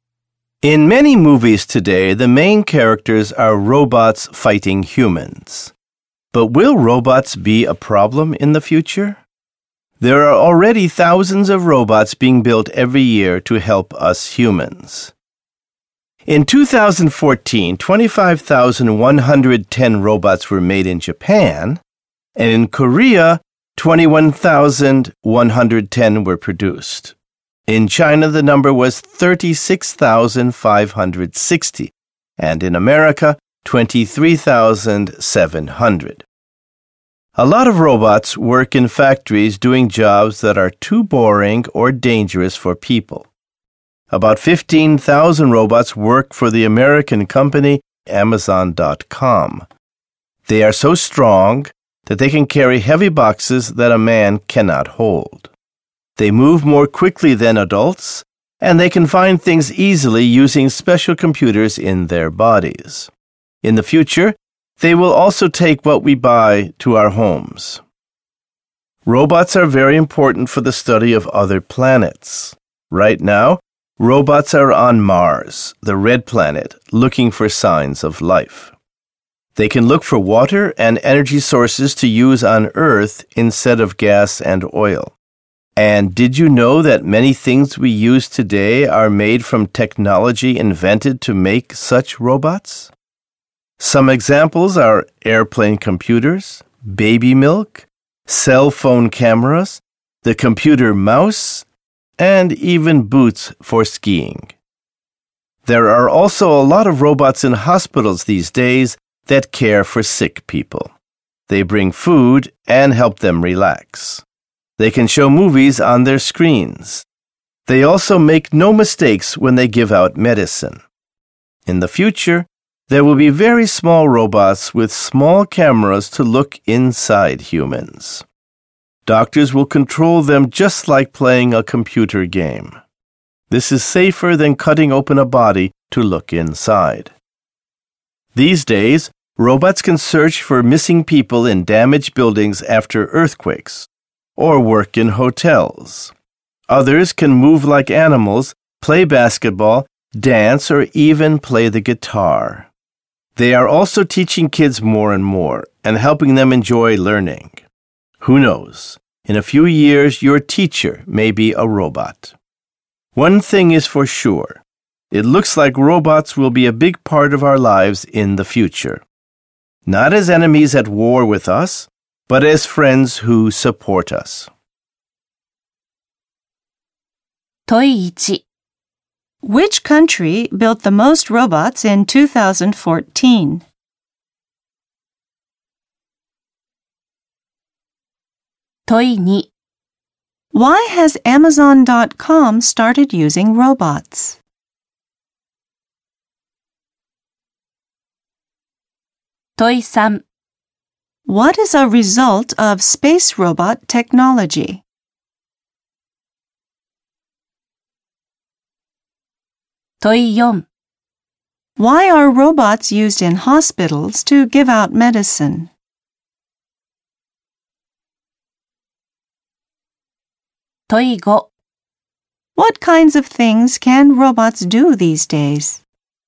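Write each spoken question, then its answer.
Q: Which country built the most robots in 2014?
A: China

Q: Why are robots used in hospitals to give out medicine?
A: They make no mistakes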